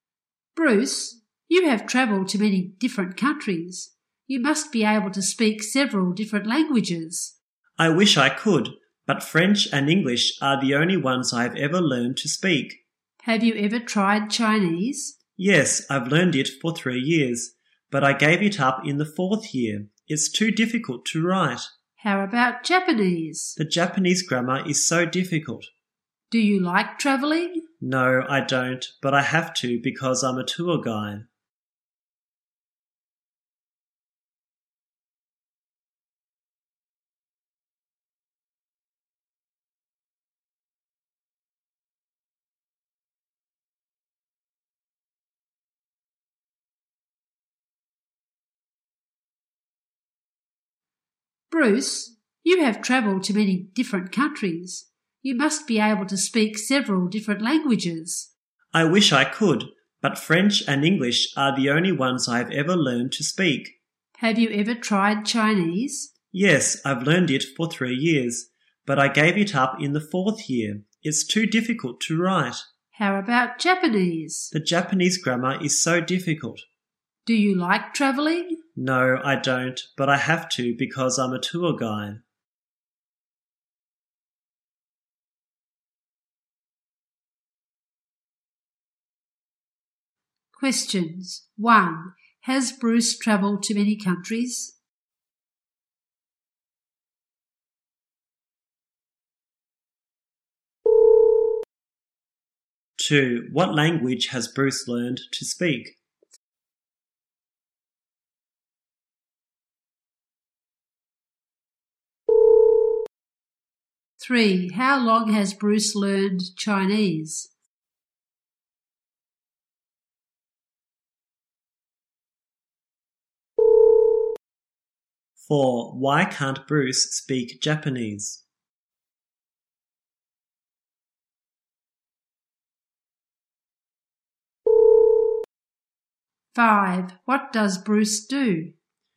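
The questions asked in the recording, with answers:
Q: Has Bruce travelled to many countries?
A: Yes

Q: What language has Bruce learned to speak?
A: French and English

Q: How long has Bruce learned Chinese?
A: 3 years

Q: Why can't Bruce speak Japanese?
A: Japanese grammar is too difficult

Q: What does Bruce do?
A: He is a tour guide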